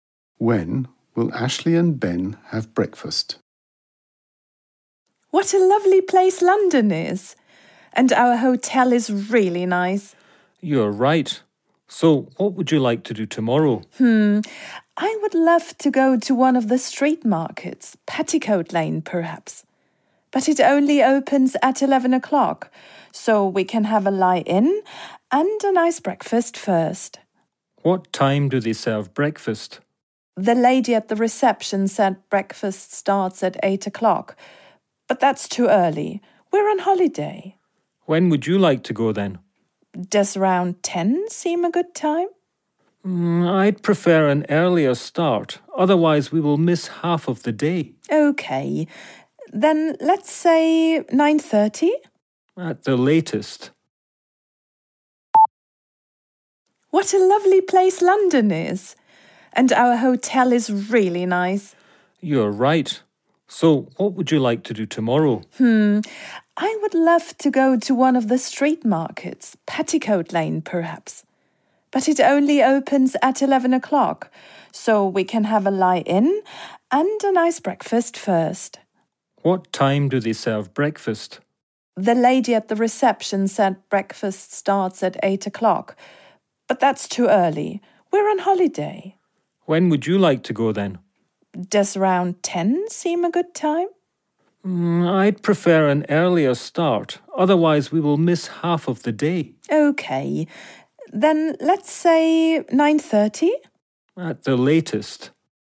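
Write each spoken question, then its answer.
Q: When will Ashley and Ben have breakfast?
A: At 9:30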